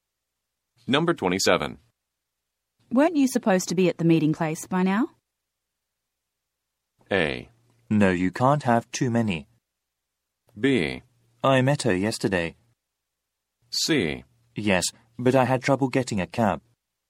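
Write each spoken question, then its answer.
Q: Weren't you supposed to be at the meeting place by now?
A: C: Yes, but I had trouble getting a cab.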